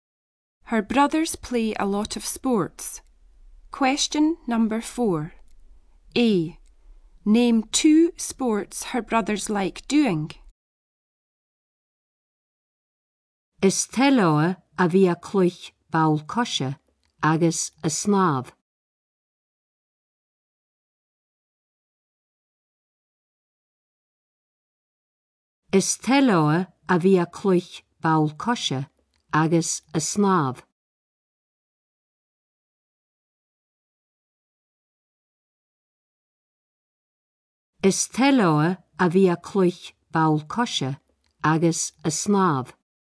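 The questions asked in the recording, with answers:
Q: Name two sports her brothers like doing.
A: Football and swimming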